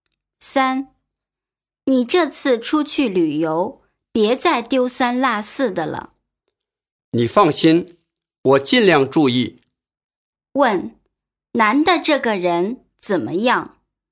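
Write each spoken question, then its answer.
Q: 男的这个人怎么样?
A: 丢三落四,马虎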